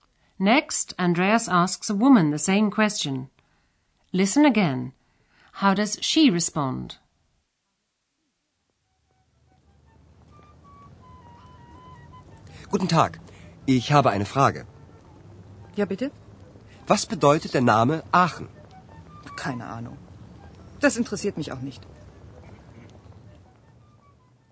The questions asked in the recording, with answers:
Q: How does she respond?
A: The woman says she has no idea.